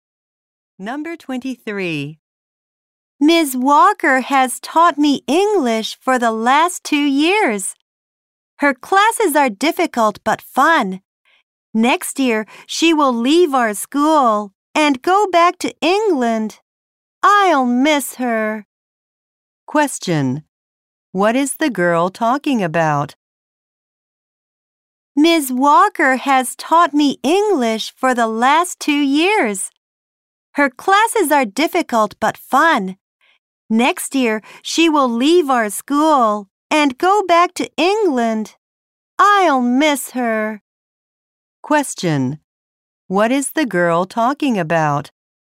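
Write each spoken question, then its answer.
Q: Question: What is the girl talking about?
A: Her English teacher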